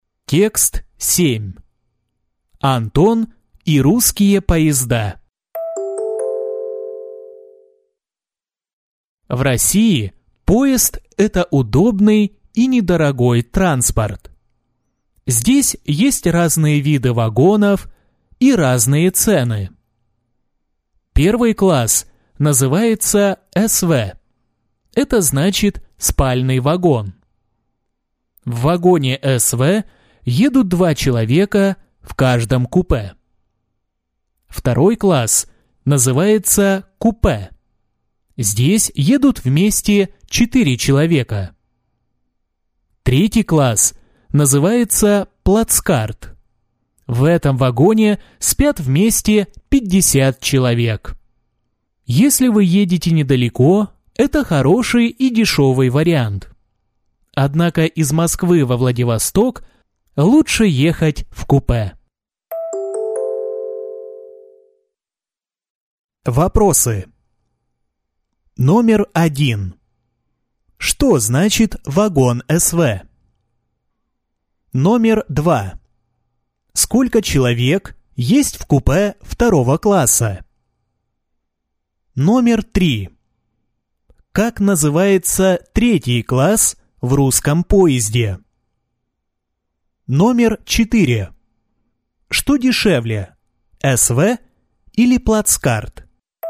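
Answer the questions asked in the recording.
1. спальный вагон
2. 4 человека
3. плацкарт
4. плацкарт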